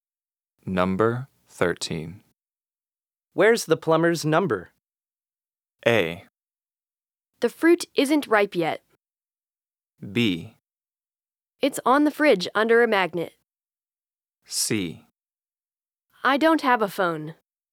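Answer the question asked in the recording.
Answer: B: It's on the fridge under a magnet.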